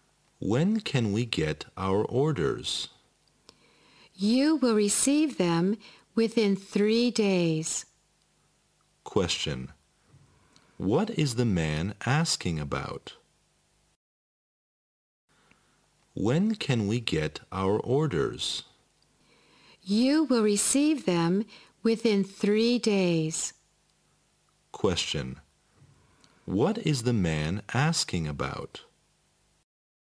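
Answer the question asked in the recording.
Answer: When they can get their orders (delivery time)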